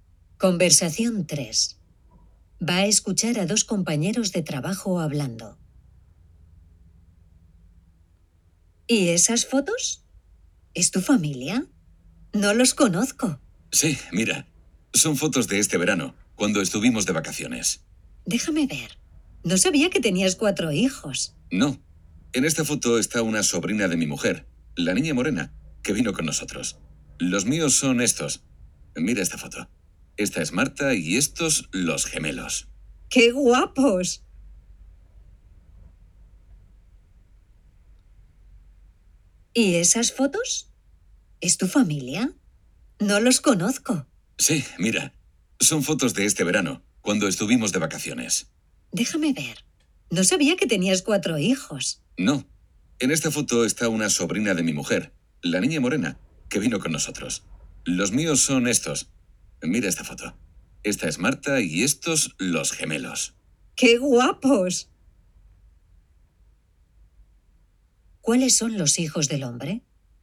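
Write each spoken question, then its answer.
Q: ¿Cuáles son los hijos del hombre?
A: Marta y los gemelos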